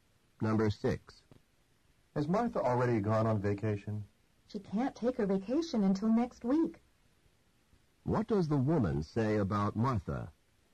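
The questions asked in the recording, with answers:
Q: What does the woman say about Martha?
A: Martha hasn't left yet; she goes next week.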